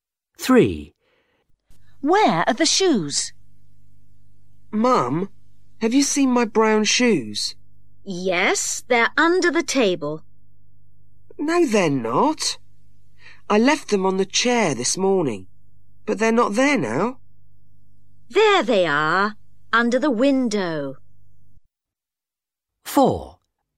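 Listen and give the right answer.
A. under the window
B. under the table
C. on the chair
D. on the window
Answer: A. under the window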